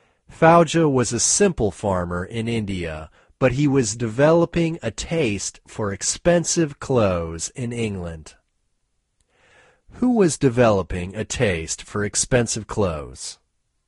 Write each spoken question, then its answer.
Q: Who was developing a taste for expensive clothes?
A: Fauja was developing a taste for expensive clothes.